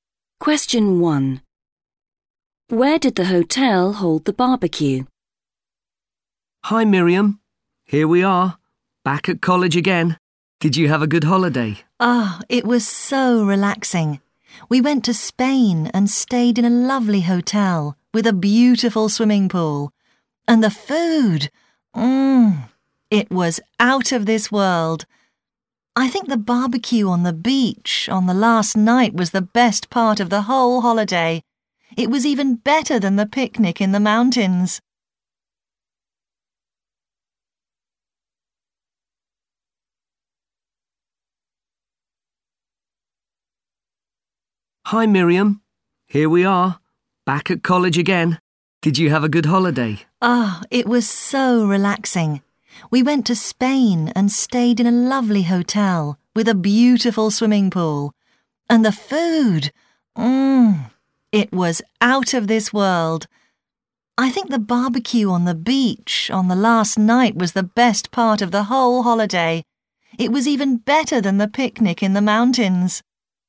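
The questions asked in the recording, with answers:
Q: Where did the hotel hold the barbecue?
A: On the beach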